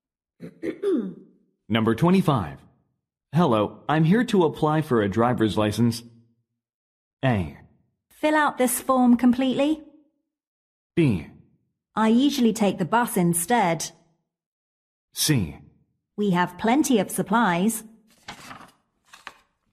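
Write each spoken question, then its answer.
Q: Hello, I'm here to apply for a driver's license.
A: A: Fill out this form completely.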